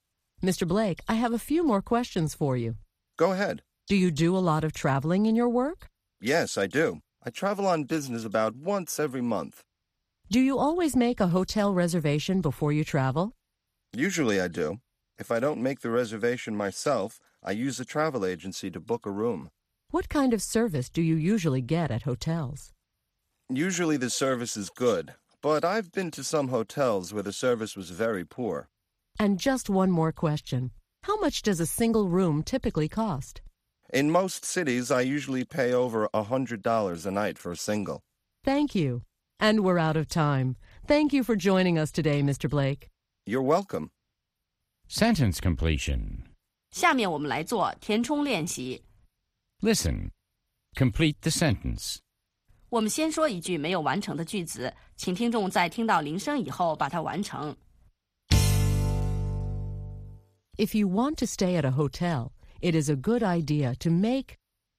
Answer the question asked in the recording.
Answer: a reservation. It's a good idea to make a reservation.